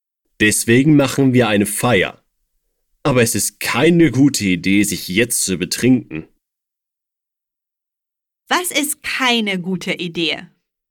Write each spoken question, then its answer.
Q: Was ist keine gute Idee?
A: Sich jetzt zu betrinken.